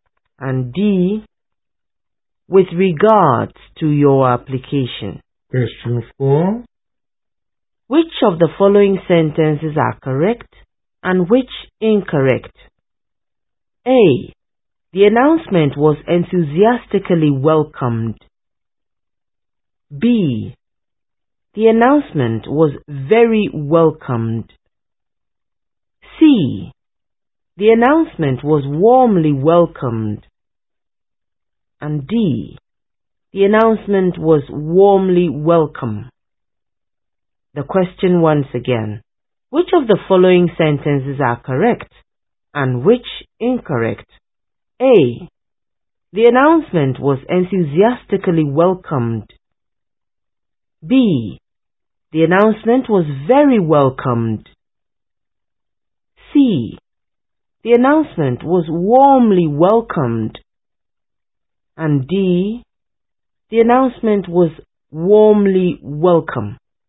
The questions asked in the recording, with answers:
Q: Which of the following sentences are correct and which incorrect?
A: Correct.